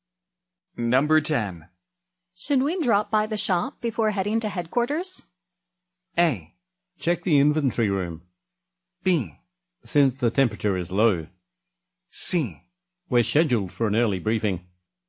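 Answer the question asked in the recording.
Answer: C: We're scheduled for an early briefing.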